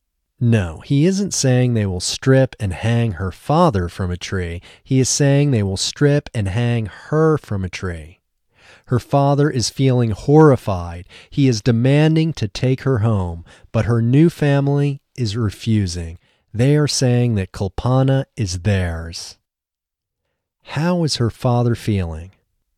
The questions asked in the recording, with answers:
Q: How is her father feeling?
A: Her father is feeling horrified.